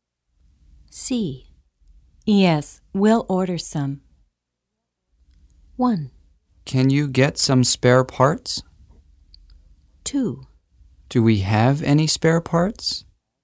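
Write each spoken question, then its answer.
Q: Yes, we'll order some.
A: 1: Can you get some spare parts?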